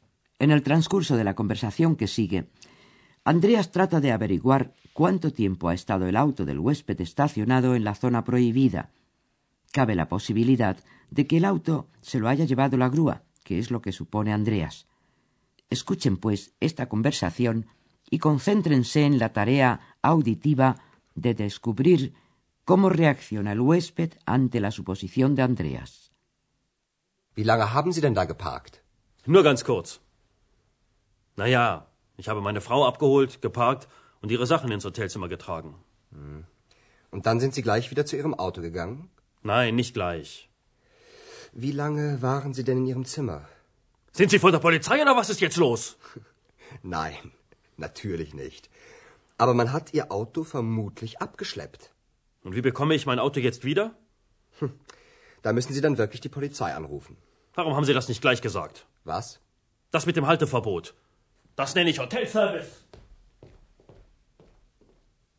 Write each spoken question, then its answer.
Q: concéntrense en la tarea auditiva de descubrir cómo reacciona el huésped ante la suposición de Andreas.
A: Como todos los débiles, el huésped descarga su enfado por una falta propia en un tercero.